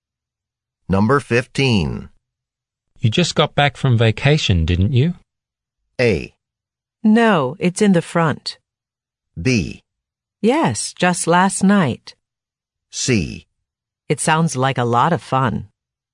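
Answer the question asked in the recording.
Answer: B: Yes, just last night.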